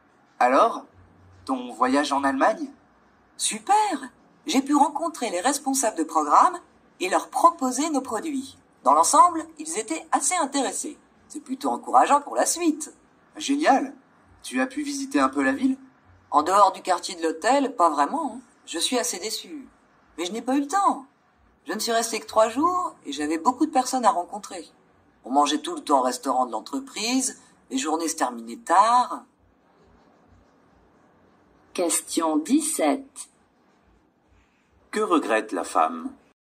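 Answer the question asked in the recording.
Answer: De ne pas avoir eu le temps de visiter la ville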